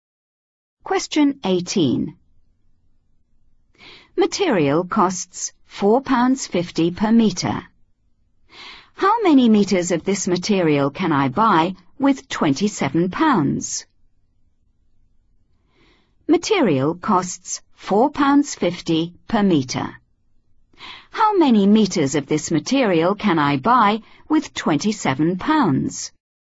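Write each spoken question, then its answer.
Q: How many meters of this material can I buy with £27?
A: 6 m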